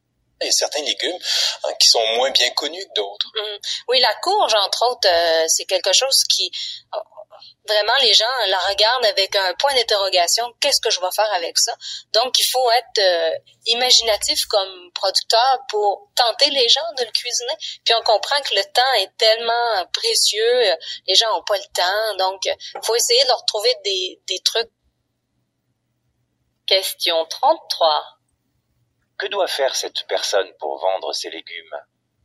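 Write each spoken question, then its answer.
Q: Que doit faire cette personne pour vendre ses légumes?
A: Être imaginative et trouver des trucs pour inciter les gens à les cuisiner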